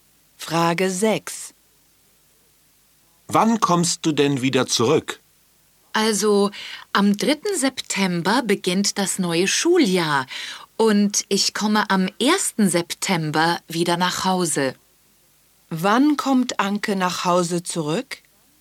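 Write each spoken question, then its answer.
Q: Wann kommt Anke nach Hause zurück?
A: Am 1. September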